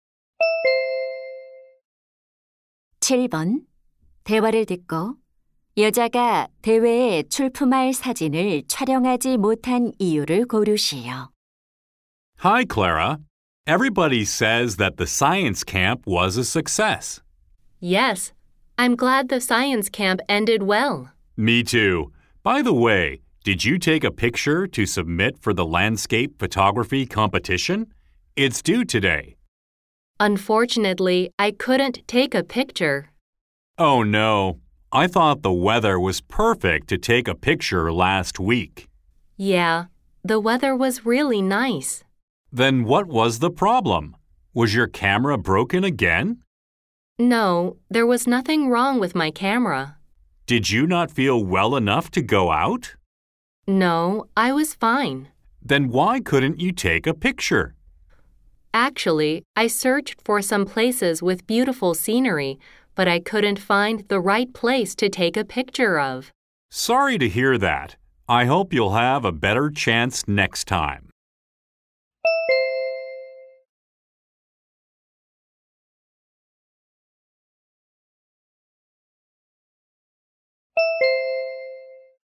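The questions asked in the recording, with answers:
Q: 여자가 대회에 출품할 사진을 촬영하지 못한 이유를 고르시오.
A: 사진 찍기에 적절한 장소를 찾지 못해서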